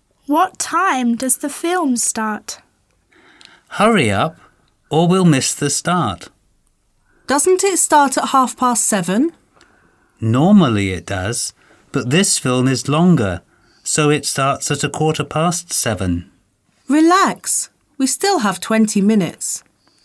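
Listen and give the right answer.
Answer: At 7:15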